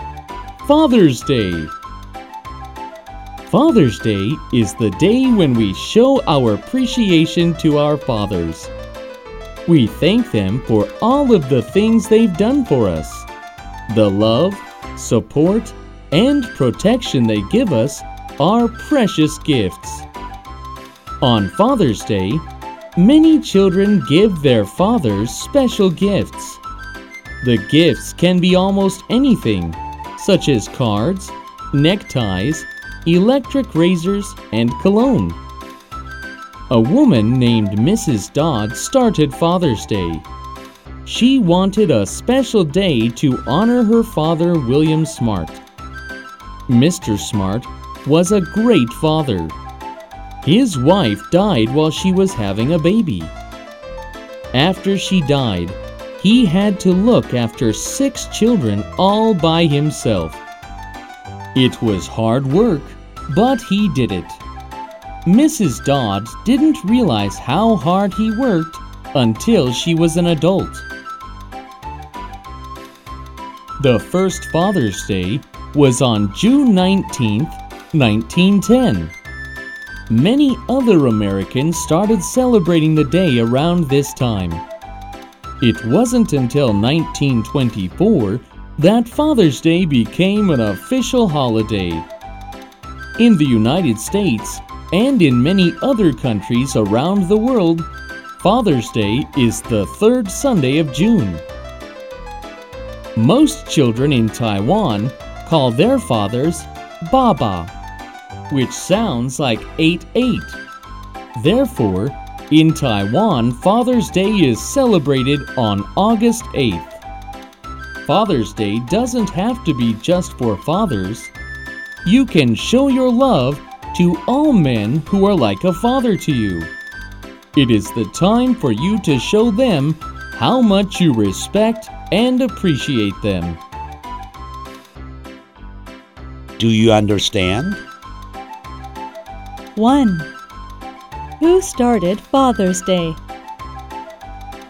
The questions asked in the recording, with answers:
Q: Who started Father's Day?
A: A woman by the name of Mrs. Dodd started Father's Day.